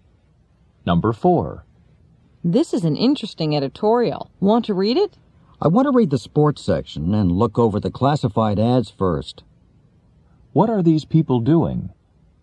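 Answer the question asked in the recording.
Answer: Reading a newspaper.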